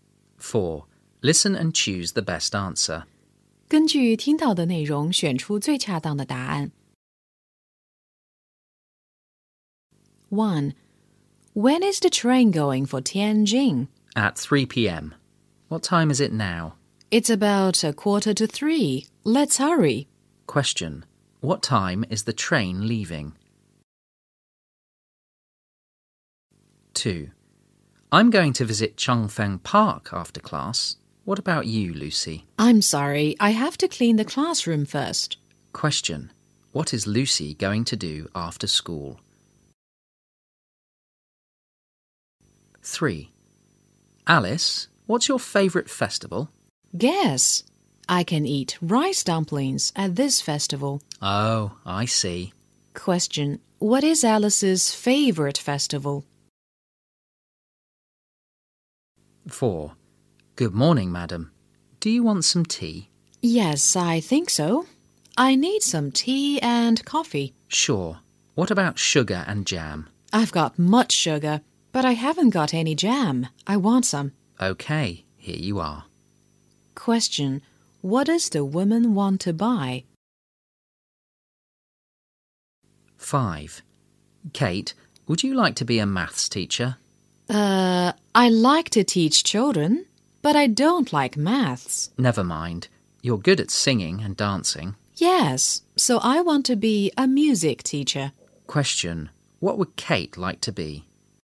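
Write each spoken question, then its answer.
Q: What time is the train leaving?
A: At 3 p.m.

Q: What is Lucy going to do after school?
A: Clean the classroom

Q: What is Alice's favourite festival?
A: The Dragon Boat Festival

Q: What would Kate like to be?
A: A music teacher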